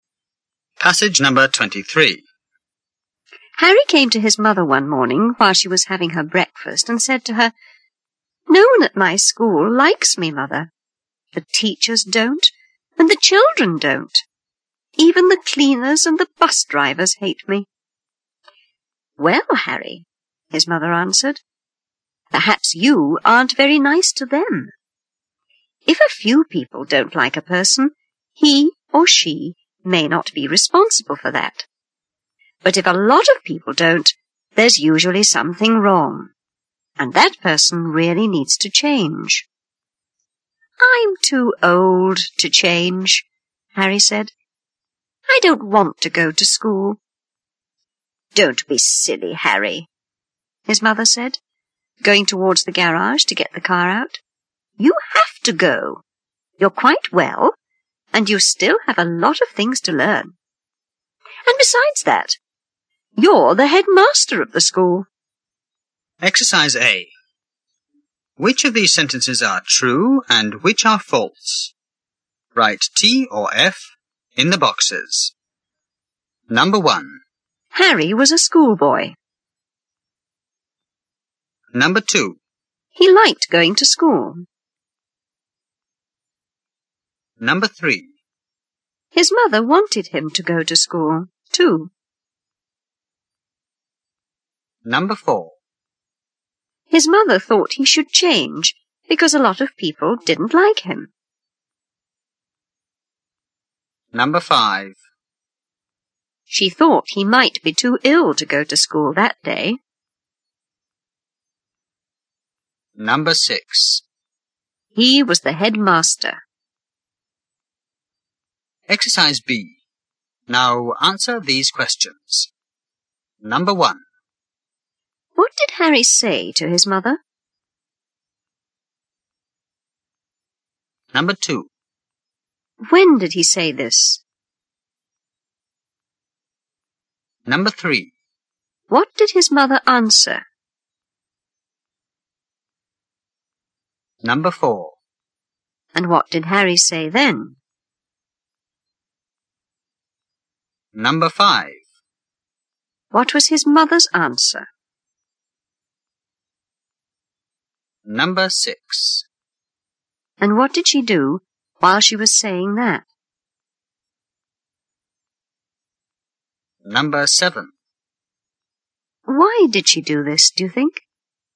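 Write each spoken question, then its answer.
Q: What did Harry say to his mother?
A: No one at his school liked him, not the teachers, children, cleaners or bus drivers

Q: When did he say this?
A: One morning while she was having breakfast

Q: What did his mother answer?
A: Perhaps he wasn't very nice to them; if many people dislike you, you need to change

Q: And what did Harry say then?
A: He was too old to change and didn't want to go to school

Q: What was his mother's answer?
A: Don't be silly; he had to go, he was well, had a lot to learn, and was the headmaster

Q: And what did she do while she was saying that?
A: She went towards the garage to get the car out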